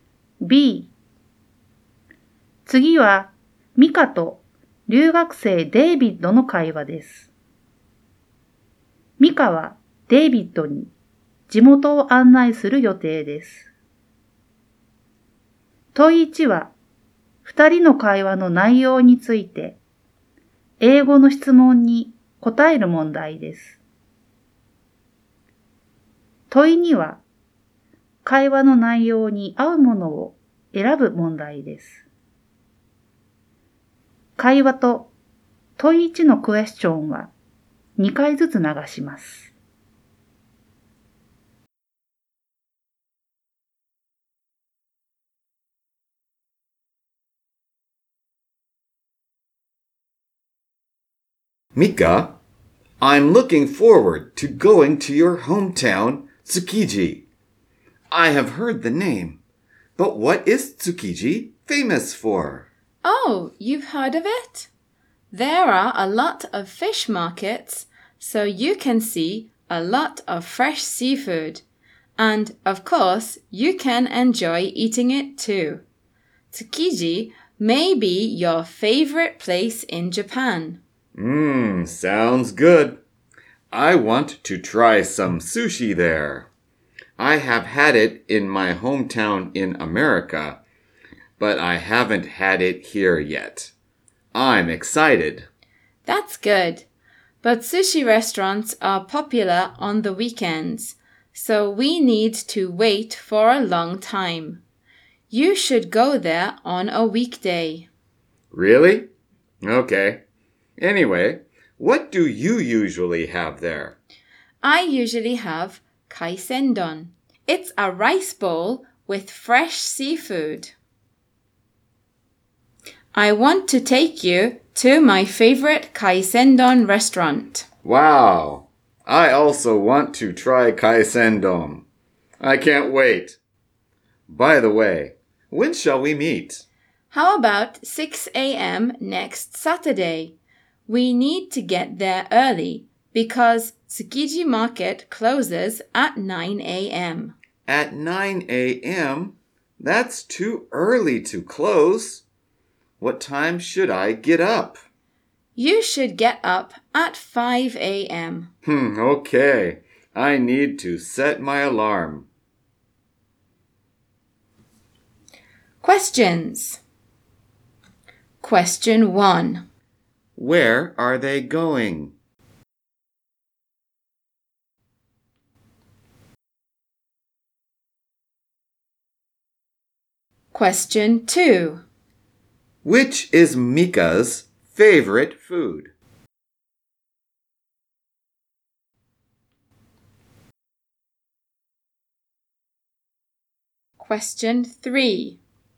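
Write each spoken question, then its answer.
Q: Where are they going?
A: Tsukiji

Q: Which is Mika's favorite food?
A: Kaisendon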